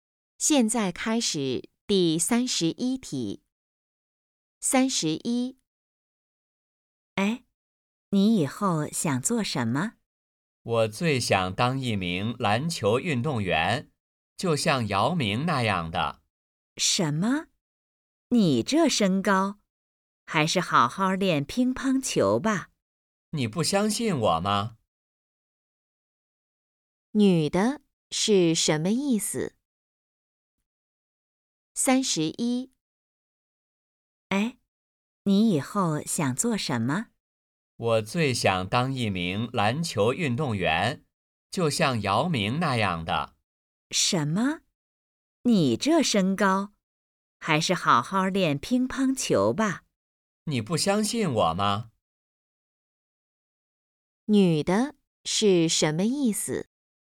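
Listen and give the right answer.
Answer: 男的个子不高,不适合打篮球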